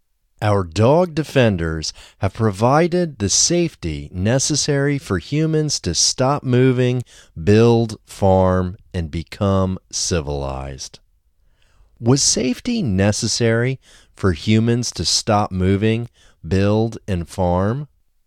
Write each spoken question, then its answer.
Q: Was safety necessary for humans to stop moving, build, and farm?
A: Yes, safety was necessary for humans to stop moving, build, and farm.